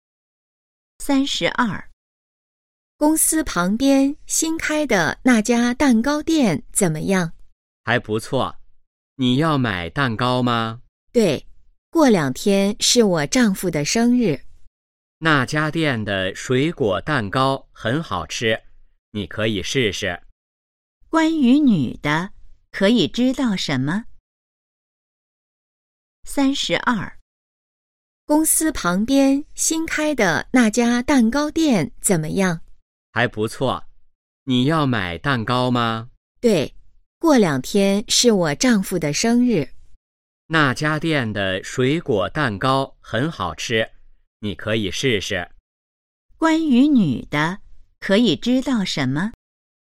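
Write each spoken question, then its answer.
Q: 关于女的,可以知道什么?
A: 她想给丈夫买生日蛋糕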